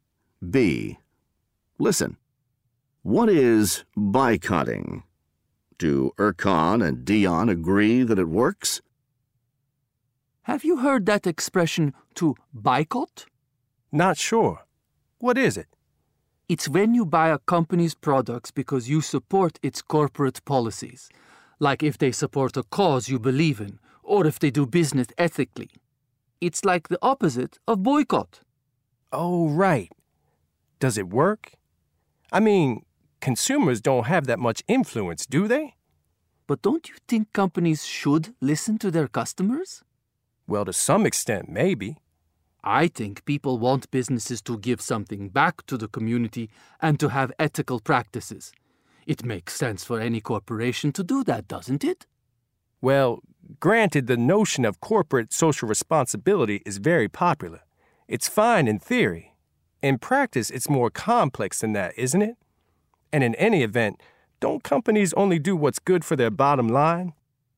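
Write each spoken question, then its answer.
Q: Do Erkan and Dion agree that it works?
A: No, they don't agree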